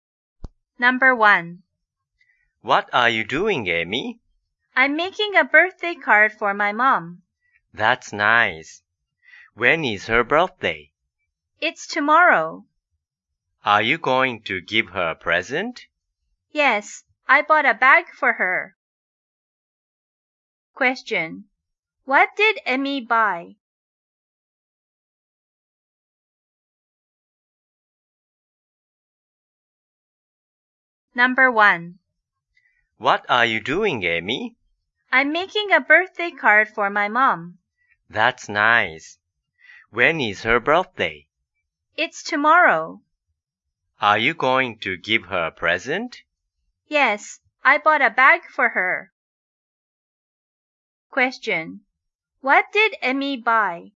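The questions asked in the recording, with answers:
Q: What did Amy buy?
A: A bag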